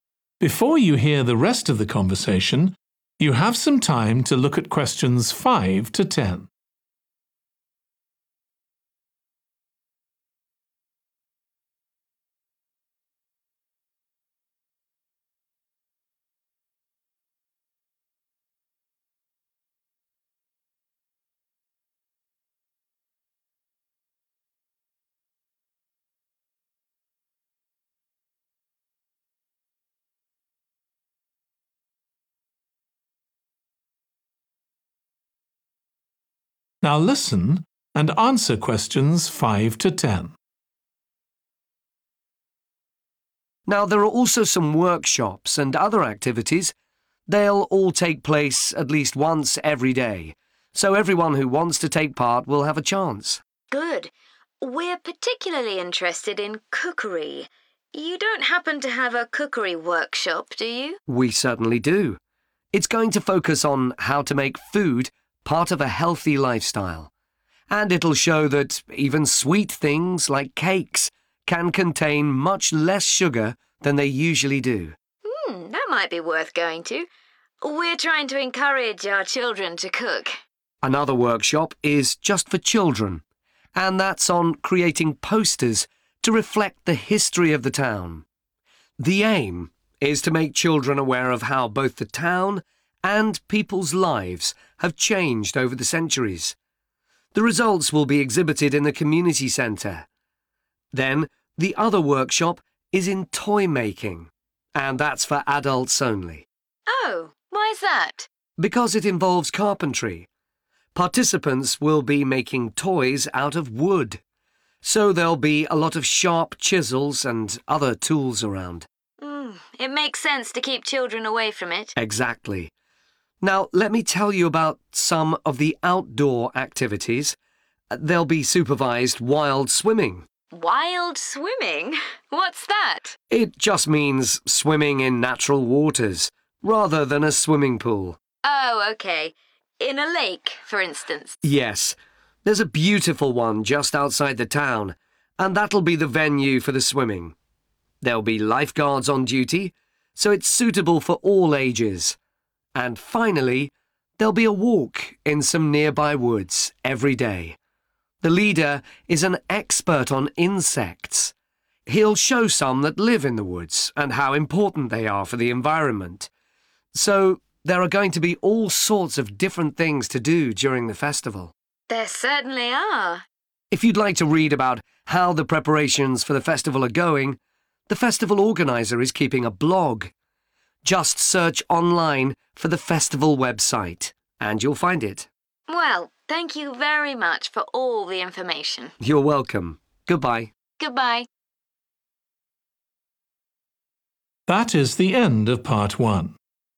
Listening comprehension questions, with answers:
Complete the notes below. Write ONE WORD ONLY for each answer.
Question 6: (children only) Making 6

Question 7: (adults only) Making toys from 7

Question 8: Swimming in the 8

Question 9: Walking in the woods, led by an expert on 9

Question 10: See the festival organiser's 10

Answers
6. posters
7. wood
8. lake
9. insects
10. blog

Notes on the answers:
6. Another workshop is just for children, and that's on creating posters to reflect the history of the town (Một buổi hội thảo nữa thì chỉ dành cho trẻ em, về việc sáng tạo ra những tấm áp phích phản ánh lịch sử của thị trấn)
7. participants will be making toys out of wood, so there'll be a lot of sharp chisels and other tools around. (những người tham gia sẽ làm đồ chơi bằng gỗ, bởi vậy sẽ có nhiều chiếc đục sắc bén cùng những công cụ khác xung quanh)
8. In a lake, for instance (Ví dụ như ở hồ).
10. If you'd like to read about how the preparations for the festival are going, the festival organizer is keeping a blog. (Nếu bạn muốn đọc về quá trình chuẩn bị cho lễ hội diễn ra như thế nào thì người tổ chức lễ hội đang giữ một bài viết)

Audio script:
A professional company is putting on a show of modern pieces, with electronic music by young composers.
JEAN: Uh-huh.
TIM: The show is about how people communicate, or fail to communicate, with each other, so (Q4) it's got the rather strange name, Chat.
JEAN: I suppose that's because that's something we do both face to face and online.
TIM: That's right.
Questions
5 – 10
Workshops ● Making 5
healthy
food ● (children only) Making 6
posters
wood
using various tools Outdoor activities ● Swimming in the 8
lake
insects
blog
for more information
TIM: Now there are also some workshops and other activities. They'll all take place at least once every day, so everyone who wants to take part will have a chance.
JEAN: Good. We're particularly interested in cookery – you don't happen to have a cookery workshop, do you?
TIM: We certainly do. (Q5) It's going to focus on how to make food part of a healthy lifestyle (Nó sẽ tập trung vào việc làm thế nào để biến thức ăn trở thành một phần của lối sống lành mạnh), and it'll show that even sweet things like cakes can contain much less sugar than they usually do.
JEAN: That might be worth going to. We're trying to encourage our children to cook.
The aim is to make children aware of how both the town and people's lives have changed over the centuries. The results will be exhibited in the community center. Then the other workshop is in toy-making, and that's for adults only.
JEAN: Oh, why's that?
TIM: Because it involves carpentry – (Q7) participants will be making toys out of wood, so there'll be a lot of sharp chisels and other tools around.
JEAN: It makes sense to keep children away from it.
TIM: Exactly. Now let me tell you about some of the outdoor activities. There'll be supervised wild swimming ...
JEAN: Wild swimming? What's that?
TIM: It just means swimming in natural waters, rather than a swimming pool.
TIM: Yes, there's a beautiful one just outside the town, and that'll be the venue for the swimming. There'll be lifeguards on duty, so it's suitable for all ages. (Q9) And finally, there'll be a walk in some nearby woods every day. The leader is an expert on insects. He'll show some that live in the woods, and how important they are for the environment. So there are going to be all sorts of different things to do during the festival.
JEAN: There certainly are.
TIM: (Q10) If you'd like to read about how the preparations for the festival are going, the festival organizer is keeping a blog. Just search online for the festival website, and you'll find it.
JEAN: Well, thank you very much for all the information.
TIM: You're welcome. Goodbye.
JEAN: Goodbye.